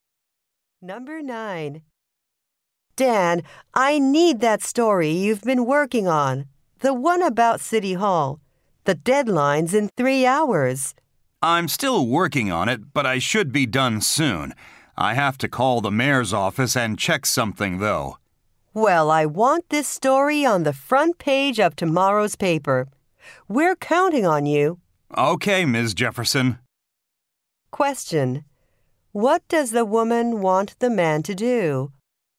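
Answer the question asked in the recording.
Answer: Finish his City Hall story before the deadline.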